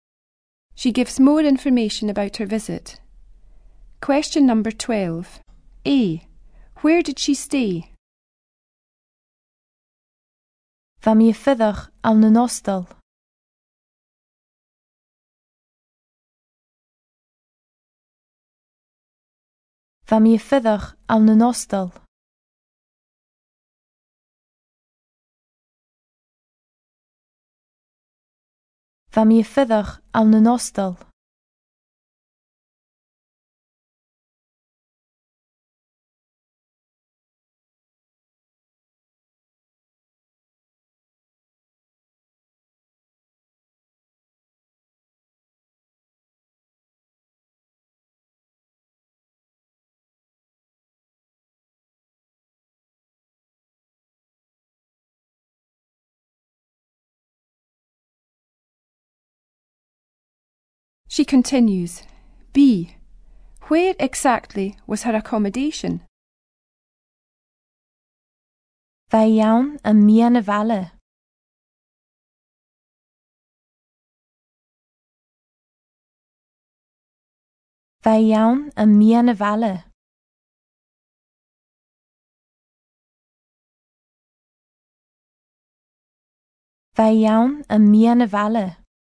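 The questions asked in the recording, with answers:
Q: Where did she stay?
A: In a hostel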